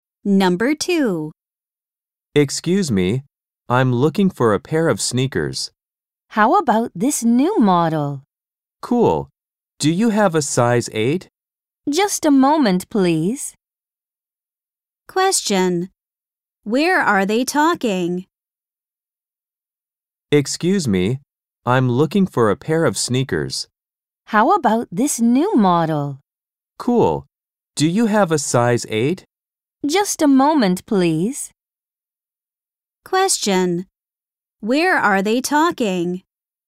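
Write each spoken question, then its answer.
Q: Where are they talking?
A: In a shoe store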